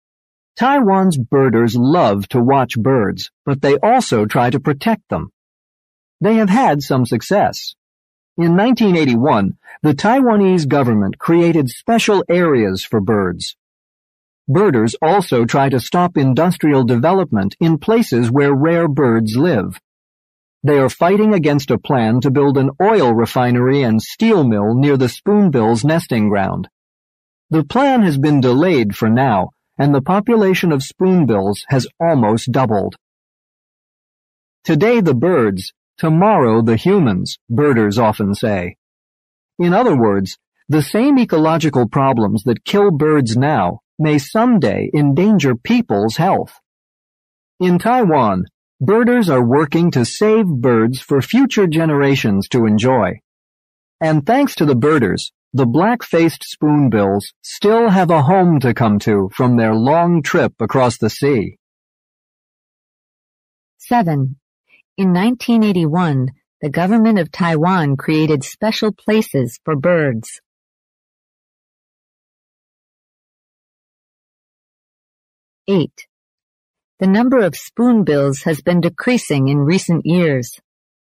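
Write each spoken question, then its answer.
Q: In 1981, the government of Taiwan created special places for birds.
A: True

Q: The number of spoonbills has been decreasing in recent years.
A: False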